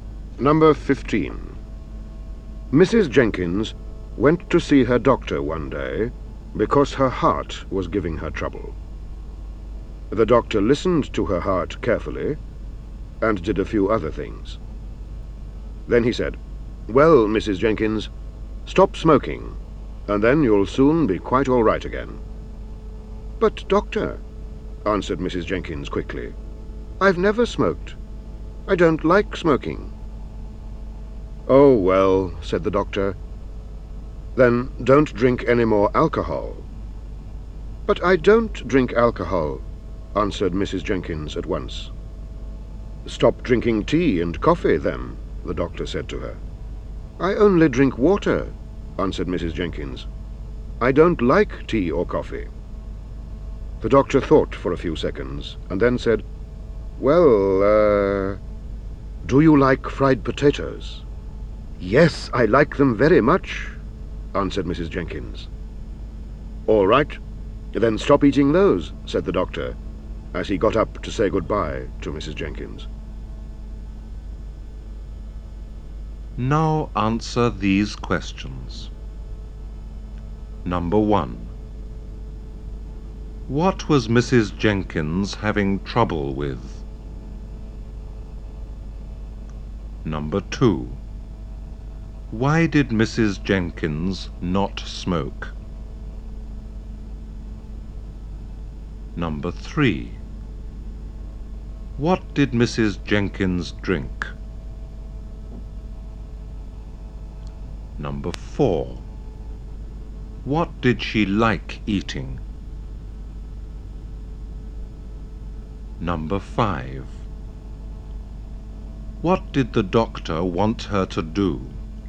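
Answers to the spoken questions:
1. Her heart
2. She didn't like smoking
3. Only water
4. Fried potatoes
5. Stop eating fried potatoes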